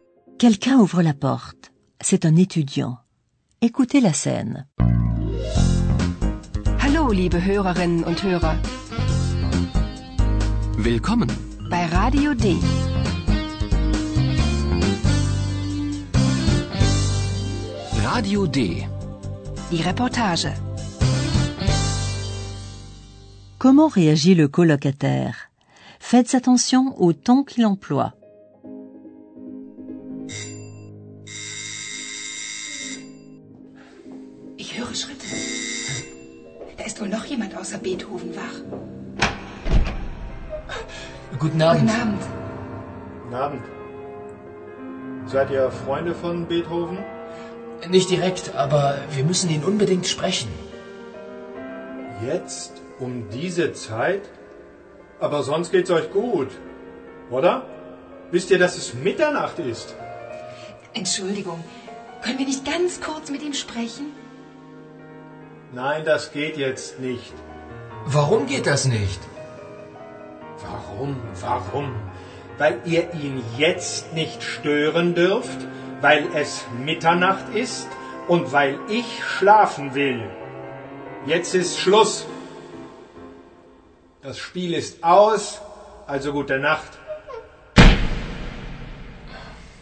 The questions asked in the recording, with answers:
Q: Comment réagit le colocataire?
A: Vous avez entendu comme la colère du colocataire monte peu à peu.